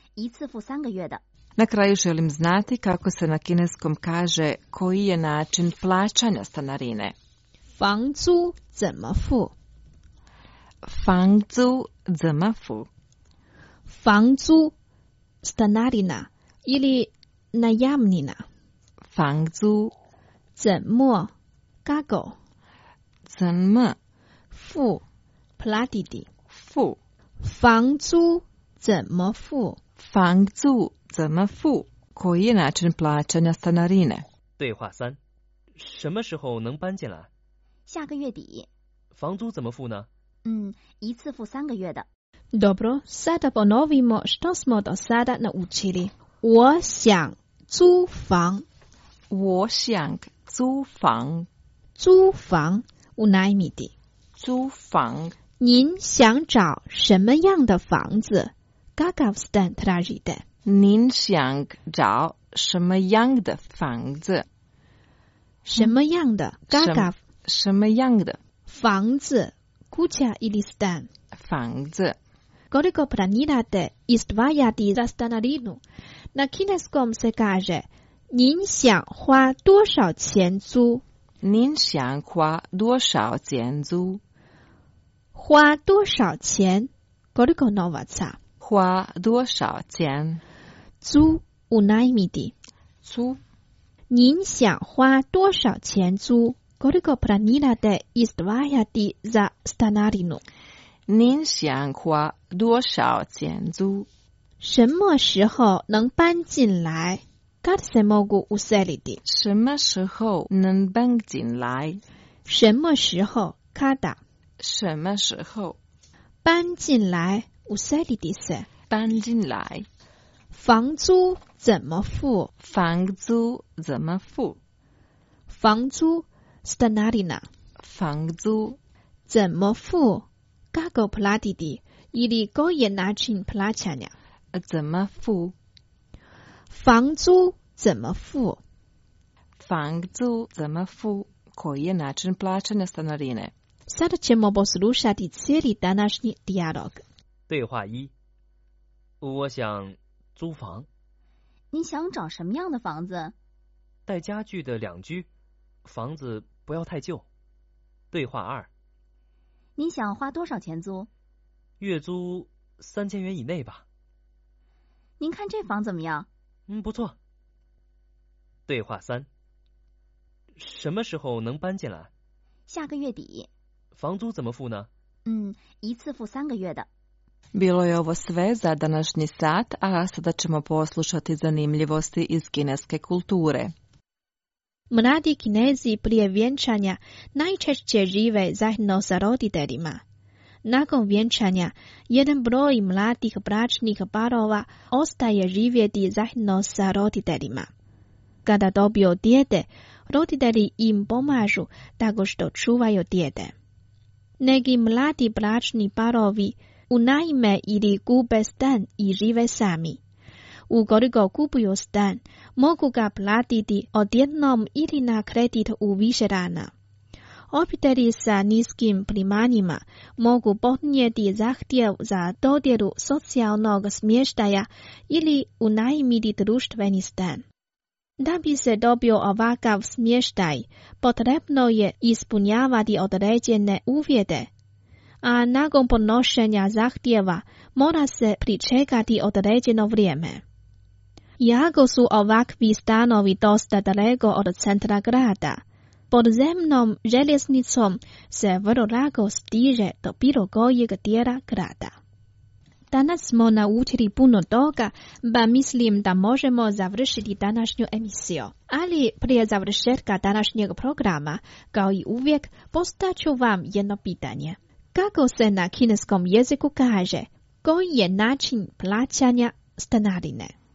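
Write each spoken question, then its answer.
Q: Kako se na kineskom jeziku kaže, koji je način plaćanja stanarine?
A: 房租怎么付?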